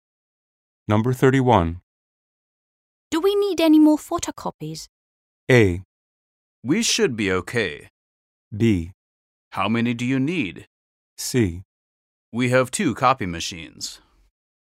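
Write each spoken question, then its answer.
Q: Do we need any more photocopies?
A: A: We should be okay.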